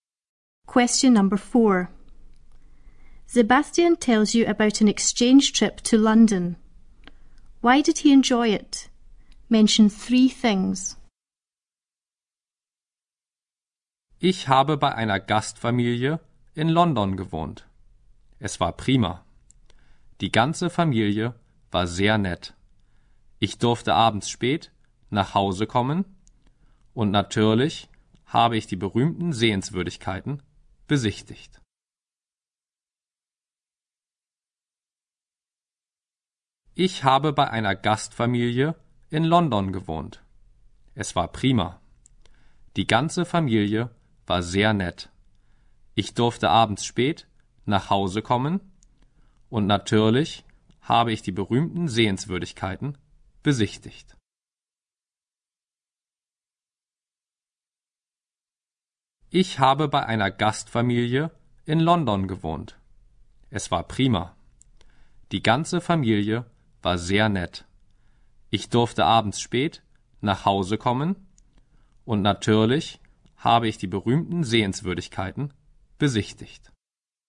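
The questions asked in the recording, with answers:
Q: Why did he enjoy it? Mention 3 things.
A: The whole host family was very nice; he was allowed to come home late in the evening; he visited the famous sights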